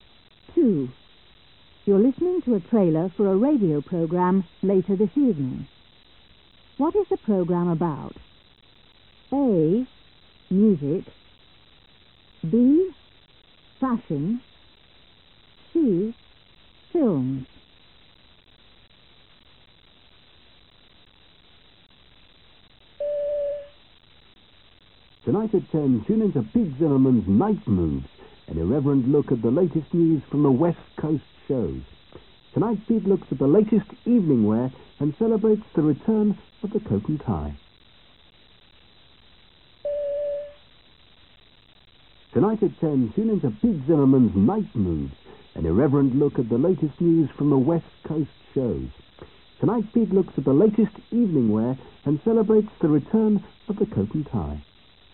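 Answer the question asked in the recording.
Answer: B: Fashion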